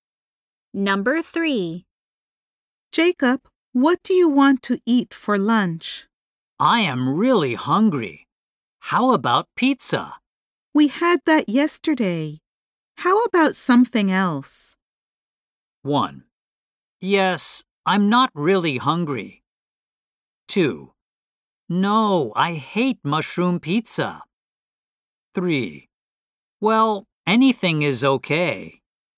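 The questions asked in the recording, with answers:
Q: We had that yesterday. How about something else?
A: 3: Well, anything is okay.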